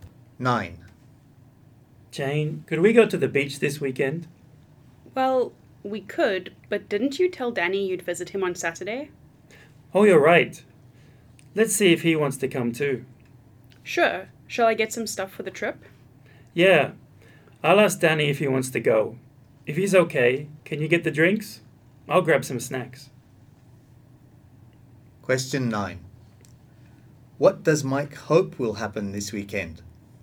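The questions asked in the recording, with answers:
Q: What does Mike hope will happen this weekend?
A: That he and Jane will go to the beach with Danny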